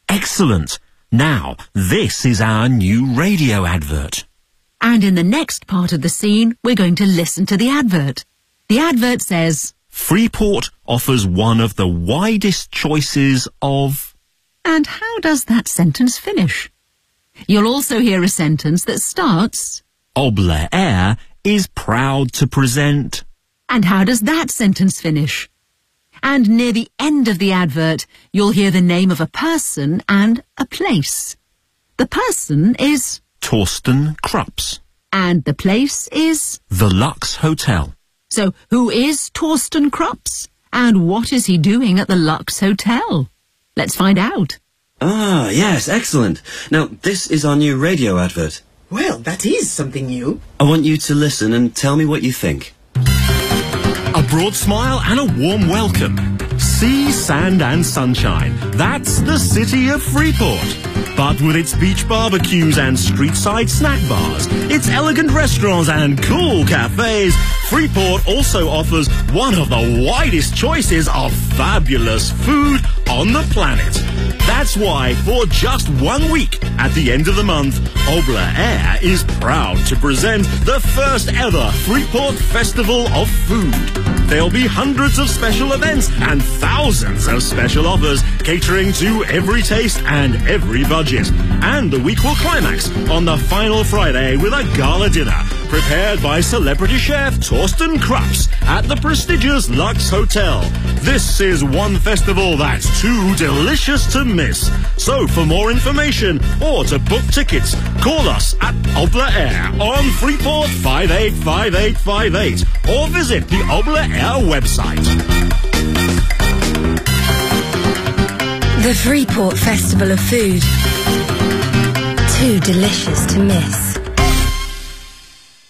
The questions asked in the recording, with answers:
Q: And how does that sentence finish?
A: Freeport offers one of the widest choices of fabulous food on the planet.

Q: And how does that sentence finish?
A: Obla Air is proud to present the first ever Freeport Festival of Food.

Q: So, who is Torsten Krups?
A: a celebrity chef is a famous person who shows people how to cook on TV.

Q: And what is he doing at the Lux Hotel?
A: the week will climax on the final Friday with a gala dinner prepared by celebrity chef Torsten Krups at the prestigious Lux Hotel.